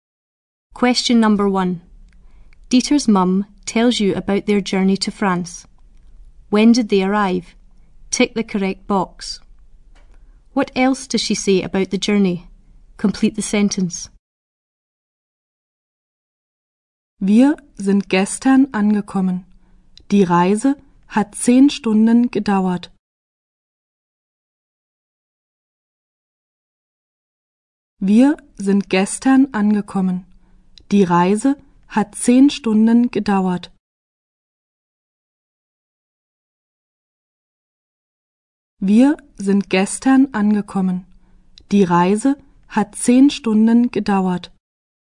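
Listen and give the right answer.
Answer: Yesterday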